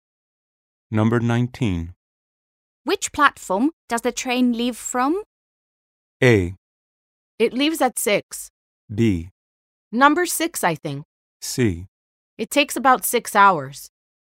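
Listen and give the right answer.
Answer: B: Number 6, I think.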